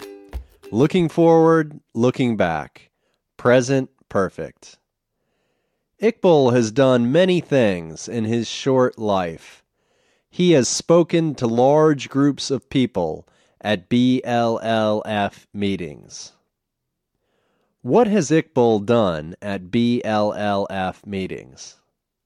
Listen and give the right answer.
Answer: He has spoken to large groups of people at BLLF meetings.